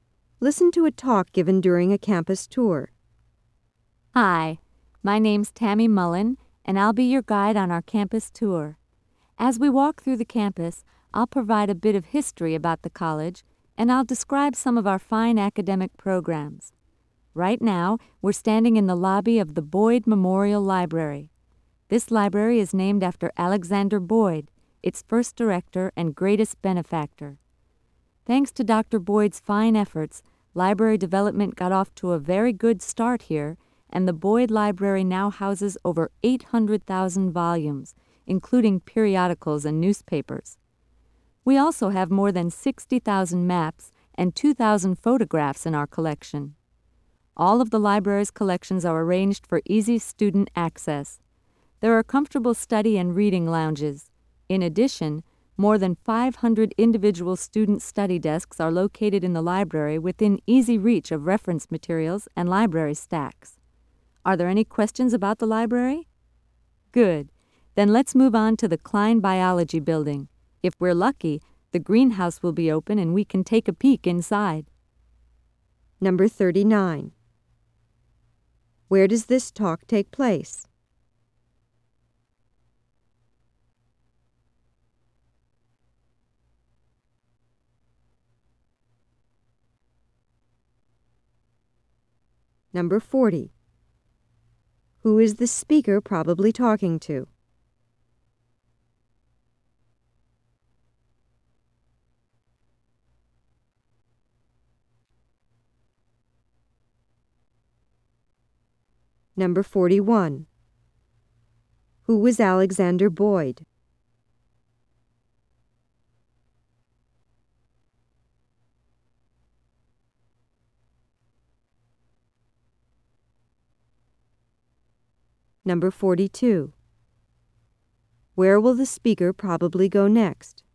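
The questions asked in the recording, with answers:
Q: Where does this talk take place?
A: In the lobby of the Boyd Memorial Library

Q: Who is the speaker probably talking to?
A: Visitors on a campus tour (prospective students)

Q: Who was Alexander Boyd?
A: The library's first director and greatest benefactor

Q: Where will the speaker probably go next?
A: To the Klein Biology Building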